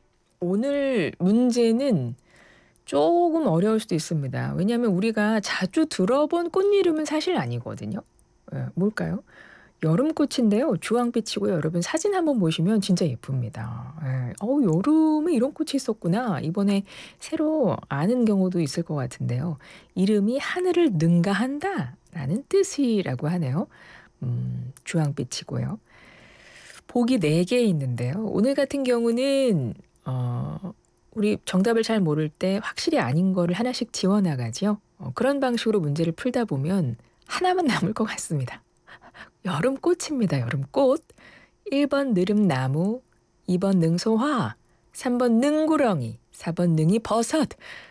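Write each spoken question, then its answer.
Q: 여름꽃입니다. 여름꽃. 1번 느릅나무, 2번 능소화, 3번 능구렁이, 4번 능이버섯.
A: 2: 능소화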